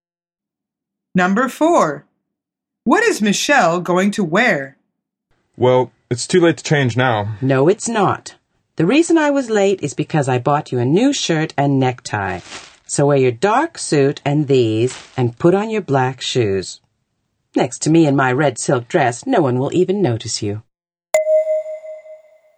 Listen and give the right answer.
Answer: The answer is a red silk dress.